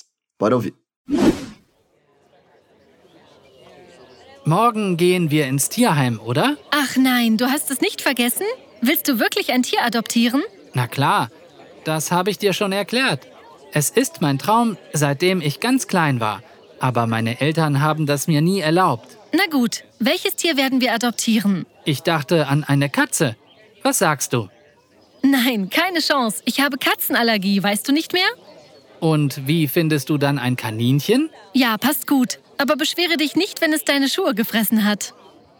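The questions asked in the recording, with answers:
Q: Tenta ouvir qual que é esse problema e qual bicho eles devem adotar no final das contas.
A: Ela tem alergia a gatos; eles devem adotar um coelho (ein Kaninchen)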